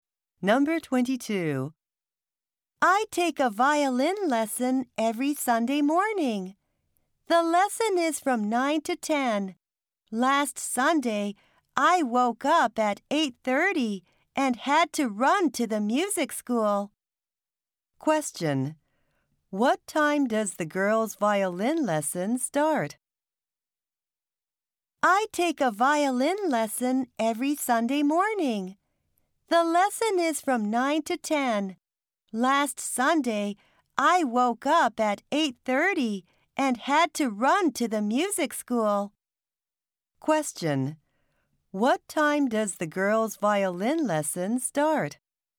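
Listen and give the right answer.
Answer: At 9 o'clock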